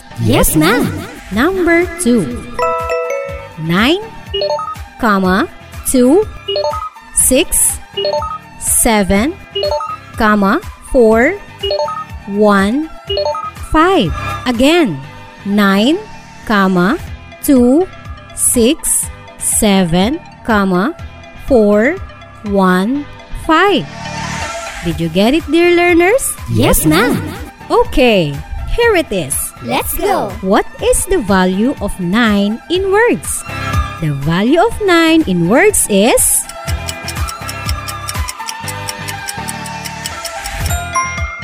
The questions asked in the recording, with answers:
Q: What is the value of 9 in words?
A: 9 million.